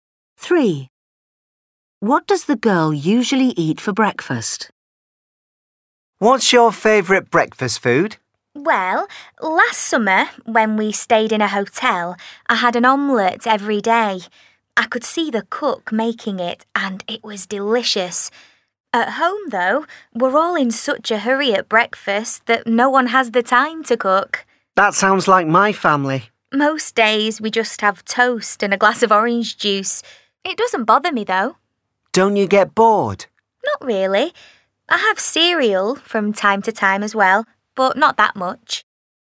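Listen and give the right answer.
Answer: toast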